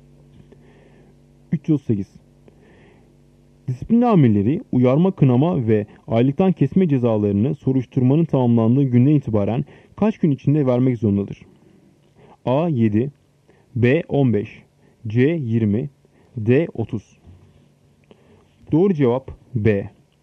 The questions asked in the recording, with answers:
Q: Disiplin amirleri uyarma, kınama ve aylıktan kesme cezalarını soruşturmanın tamamlandığı günden itibaren kaç gün içinde vermek zorundadır?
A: Doğru cevap B. 15